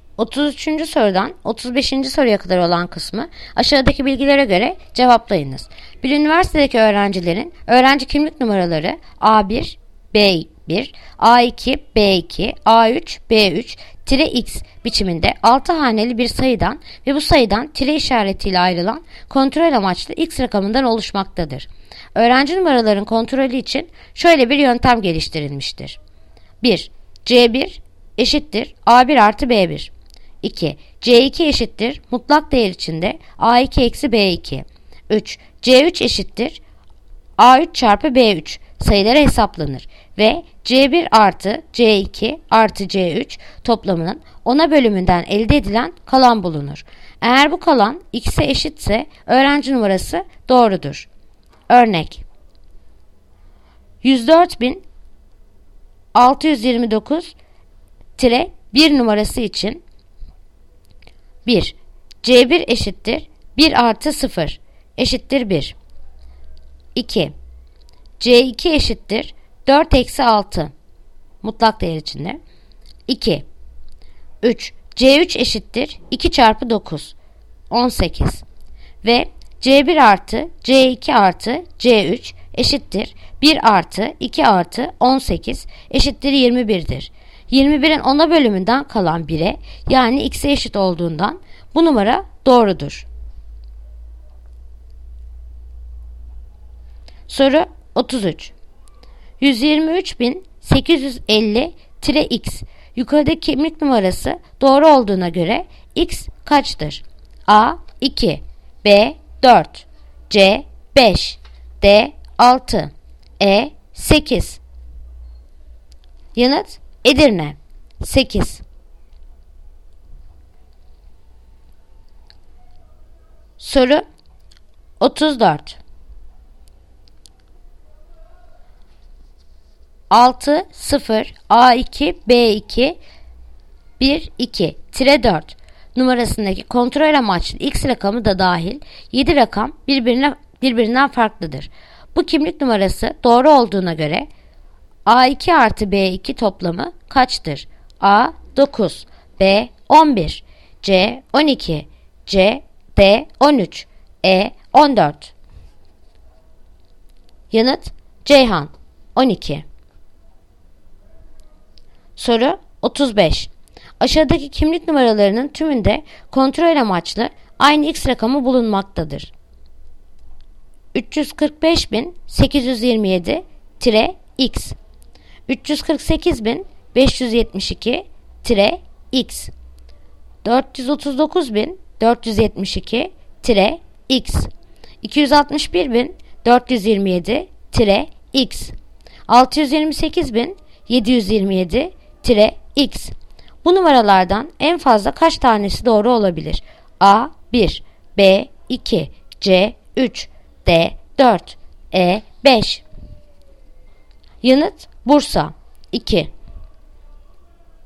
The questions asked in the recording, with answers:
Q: 123.850-x yukarıdaki kimlik numarası doğru olduğuna göre x kaçtır?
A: Yanıt Edirne 8.

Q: Bu kimlik numarası doğru olduğuna göre A2 artı B2 toplamı kaçtır?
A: Yanıt Ceyhan 12.

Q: Bu numaralardan en fazla kaç tanesi doğru olabilir?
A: Yanıt Bursa 2